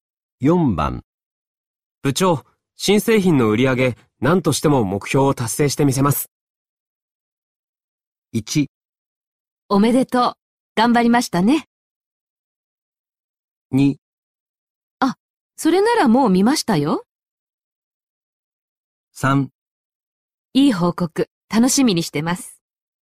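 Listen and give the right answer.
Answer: 3: いい報告、楽しみにしてます。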